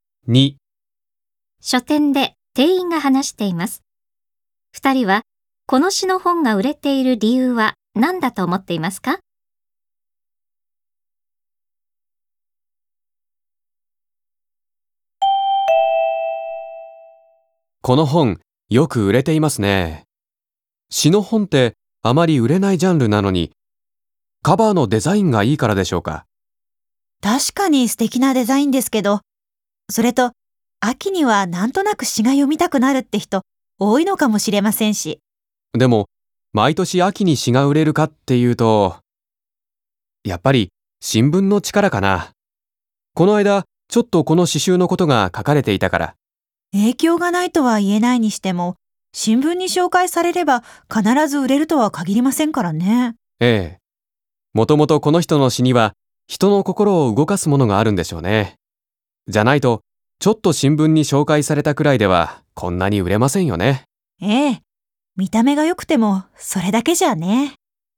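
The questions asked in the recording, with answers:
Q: 二人はこの詩の本が売れている理由は何だと思っていますか?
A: この人の詩にはもともと人の心を動かすものがあるから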